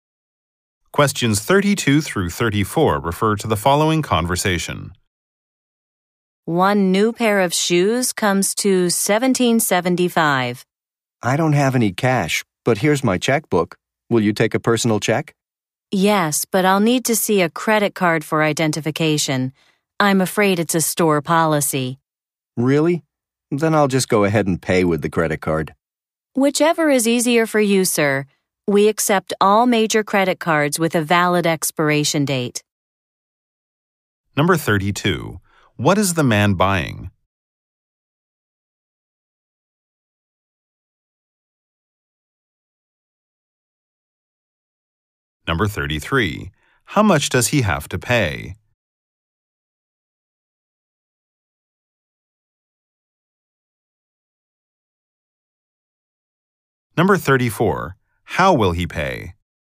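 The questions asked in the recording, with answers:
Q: What is the man buying?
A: A pair of shoes

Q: How much does he have to pay?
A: $17.75

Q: How will he pay?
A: By credit card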